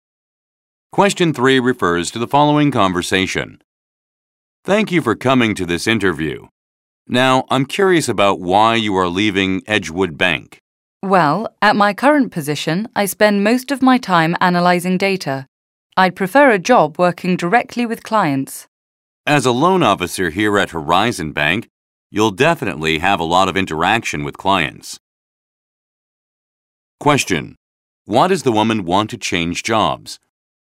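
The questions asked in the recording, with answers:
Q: Why does the woman want to change jobs?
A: She wants to work directly with clients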